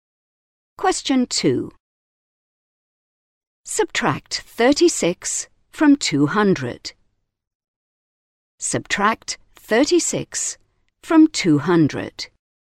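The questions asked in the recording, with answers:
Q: Subtract 36 from 200.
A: 164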